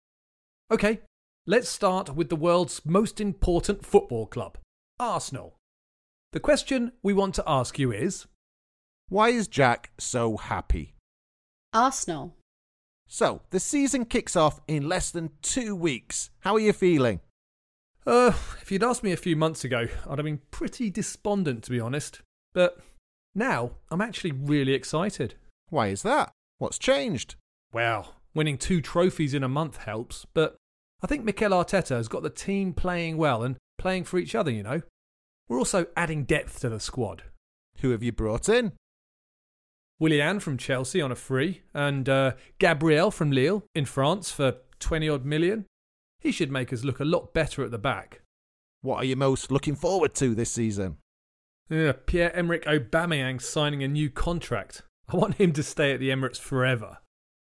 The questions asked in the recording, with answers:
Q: why is Jack so happy?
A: Well, I'm happy with our new signings, and I'm very happy how Mikel Arteta is changing the team.